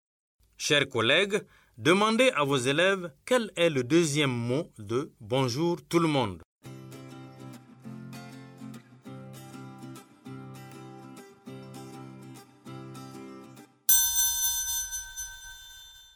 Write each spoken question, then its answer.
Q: Chers collègues, demandez à vos élèves quel est le deuxième mot de bonjour tout le monde.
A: J'espère que vos élèves ont dit tout.